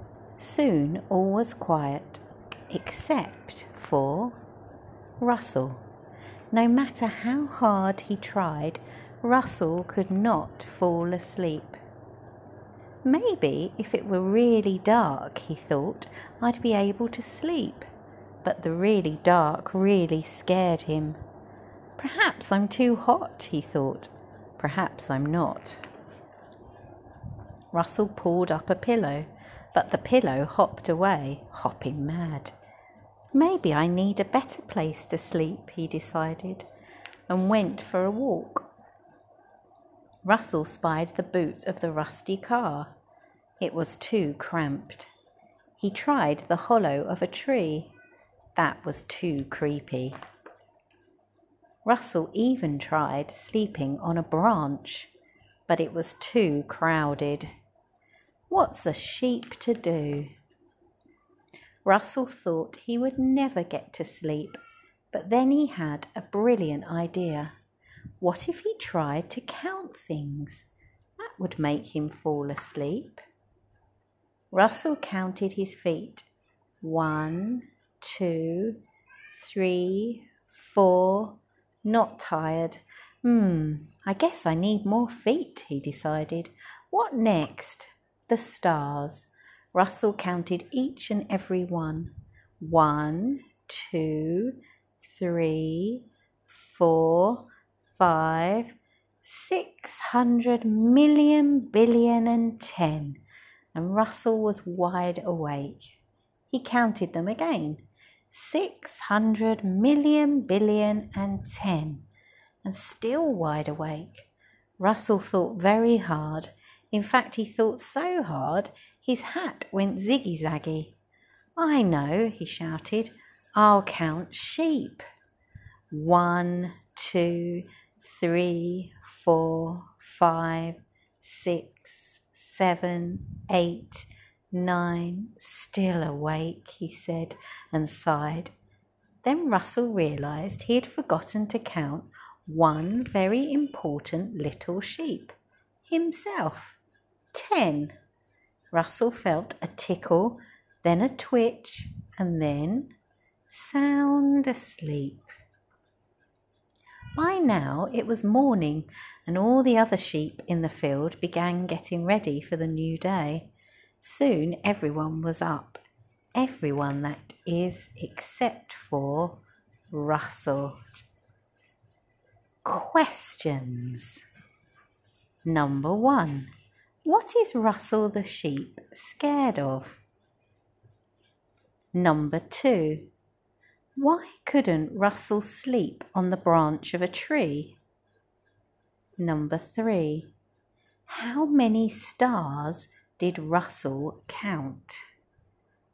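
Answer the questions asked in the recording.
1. The really dark
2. It was too crowded
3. 600,000,000,010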